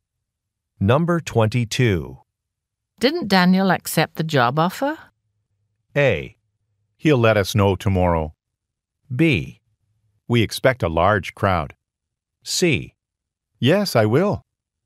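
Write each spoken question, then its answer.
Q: Didn't Daniel accept the job offer?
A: A: He'll let us know tomorrow.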